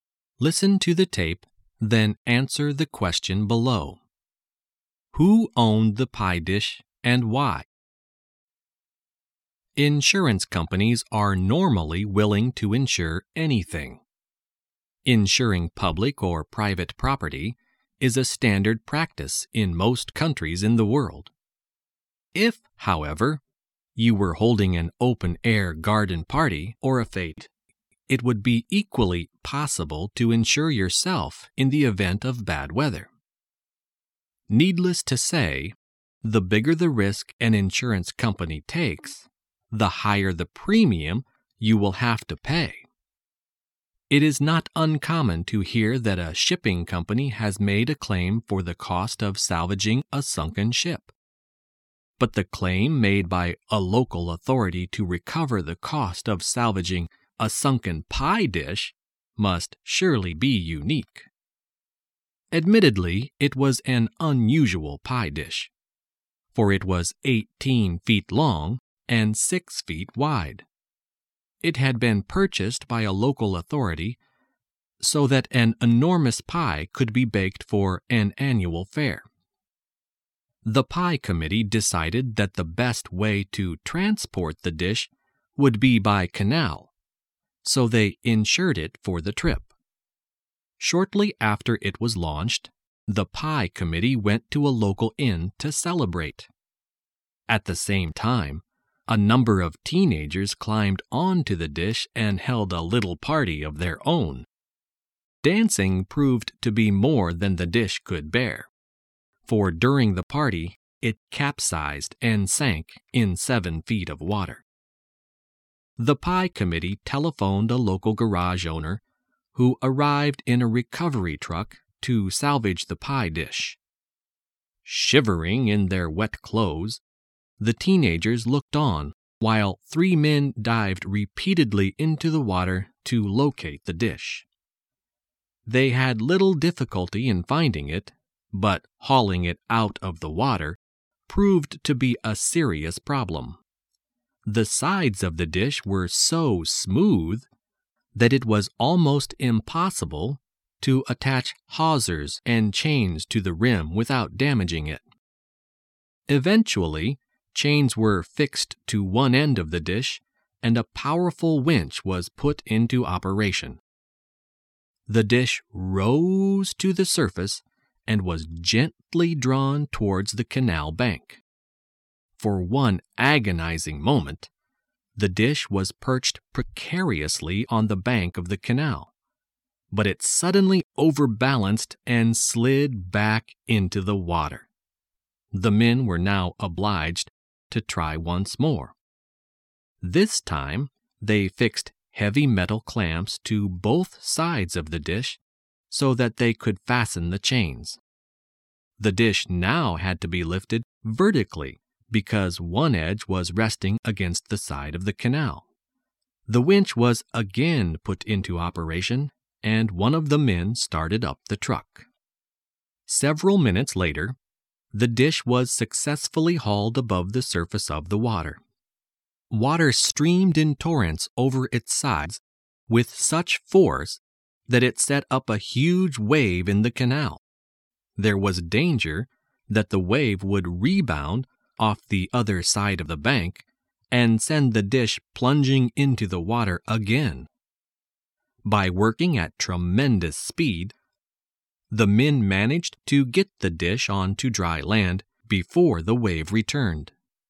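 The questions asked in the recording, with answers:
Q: Who owned the pie dish and why?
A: A local authority owned it; it bought the dish so an enormous pie could be baked for an annual fair.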